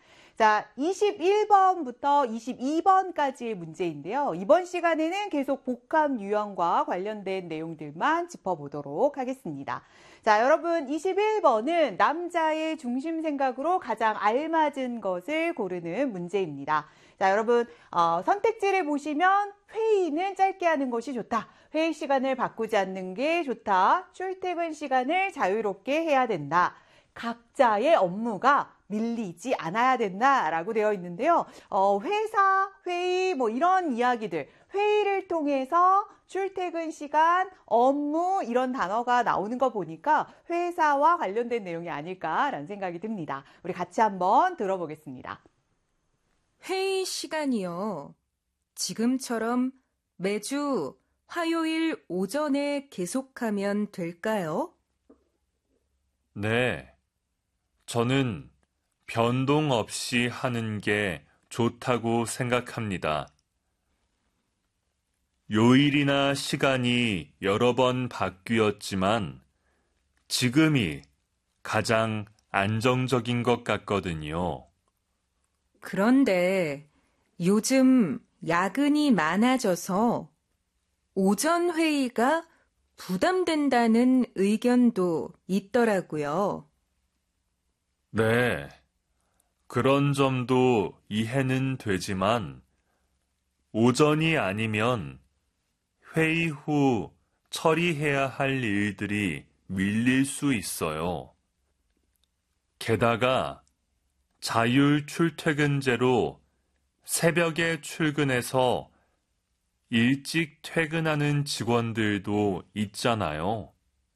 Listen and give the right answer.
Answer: 회의 시간을 바꾸지 않는 것이 좋다가 정답이 되겠습니다.